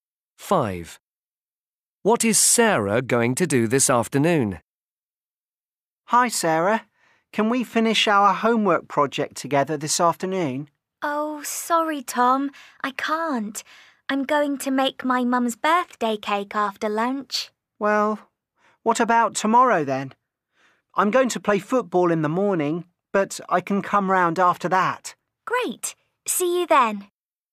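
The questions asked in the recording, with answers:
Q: What is Sarah going to do this afternoon?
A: Make her mum's birthday cake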